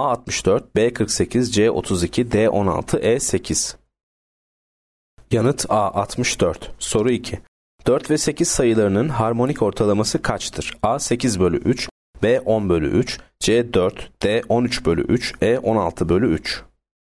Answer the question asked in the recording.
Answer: Yanıt E 16 bölü 3.